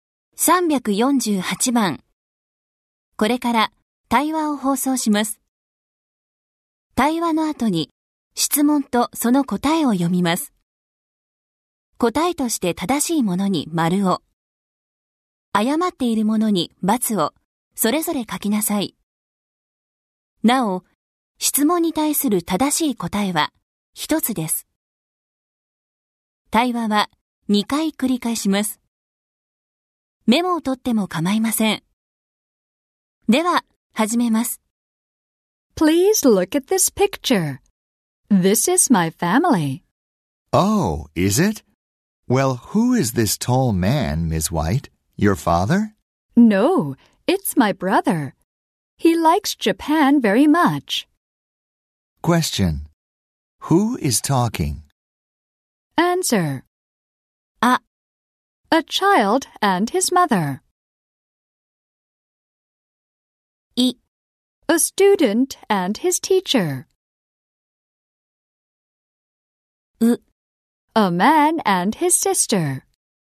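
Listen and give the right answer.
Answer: A student and his teacher.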